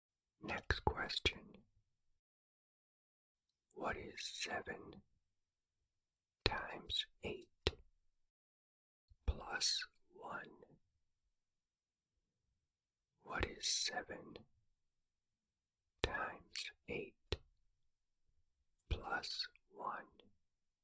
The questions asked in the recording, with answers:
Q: What is 7 times 8 plus 1?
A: The answer is 57.